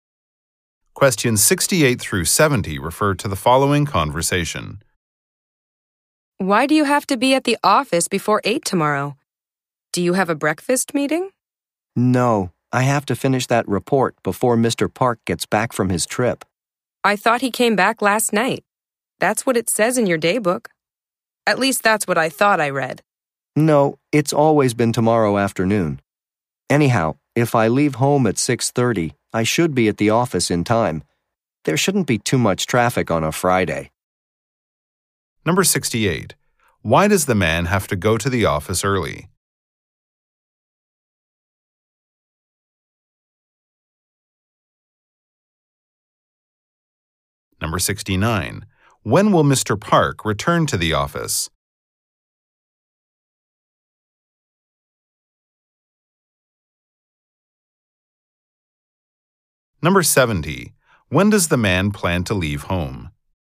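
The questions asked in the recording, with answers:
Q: Why does the man have to go to the office early?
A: To finish a report before Mr. Park gets back

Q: When will Mr. Park return to the office?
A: Tomorrow afternoon

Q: When does the man plan to leave home?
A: 6:30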